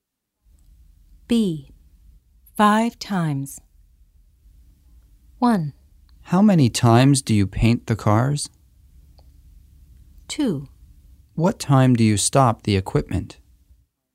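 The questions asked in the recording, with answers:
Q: 5 times.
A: 1: How many times do you paint the cars?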